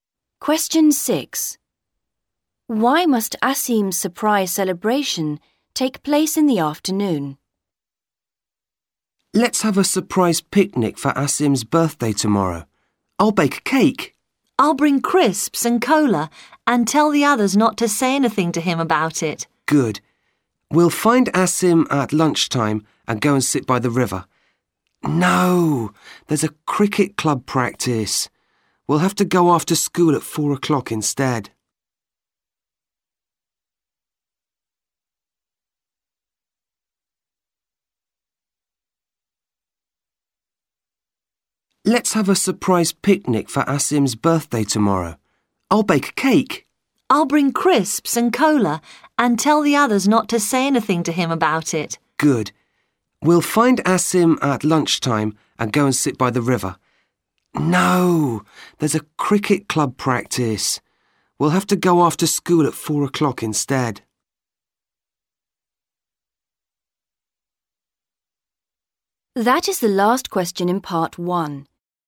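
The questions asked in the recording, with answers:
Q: Why must Asim's surprise celebration take place in the afternoon?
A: There is a cricket club practice at lunchtime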